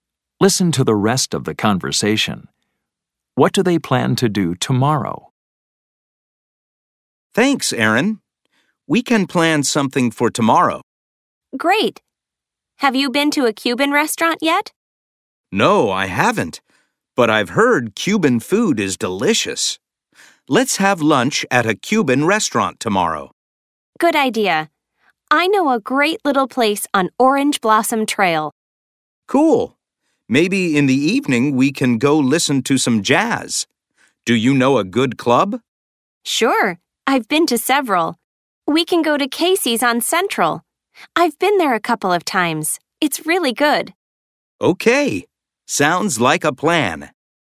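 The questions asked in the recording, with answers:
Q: What do they plan to do tomorrow?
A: Have lunch at a Cuban restaurant and listen to jazz at Casey's on Central in the evening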